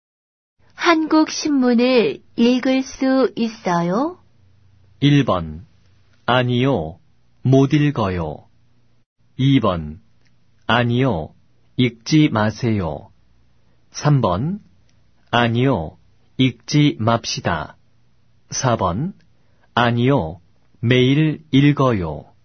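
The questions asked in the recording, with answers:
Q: 한국 신문을 읽을 수 있어요?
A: 1번: 아니요. 못 읽어요.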